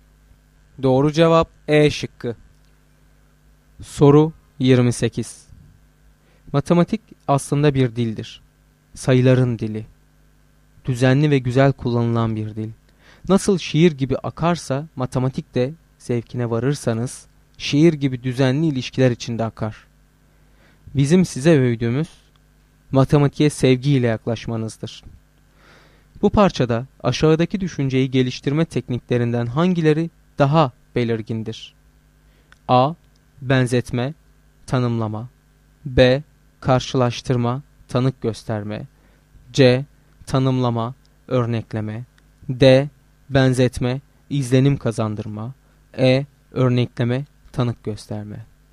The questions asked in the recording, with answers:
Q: Bu parçada aşağıdaki düşünceyi geliştirme tekniklerinden hangileri daha belirgindir?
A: Doğru cevap A şıkkı.